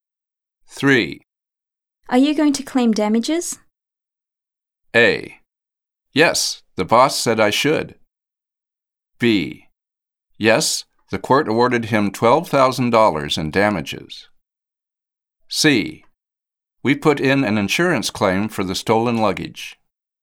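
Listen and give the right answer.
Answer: A: Yes, the boss said I should.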